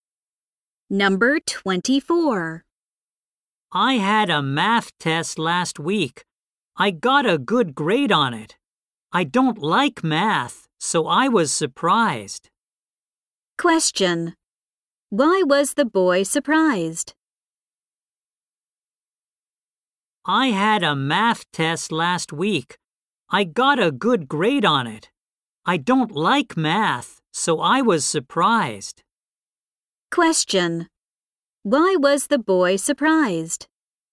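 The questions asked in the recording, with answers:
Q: Why was the boy surprised?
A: He got a good grade on his math test, though he doesn't like math.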